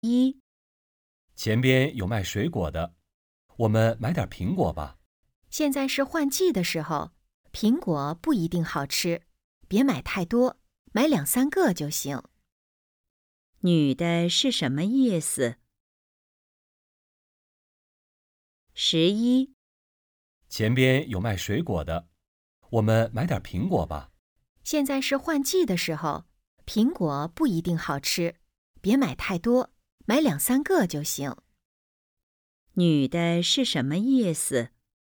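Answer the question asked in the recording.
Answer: 苹果别买太多,买两三个就行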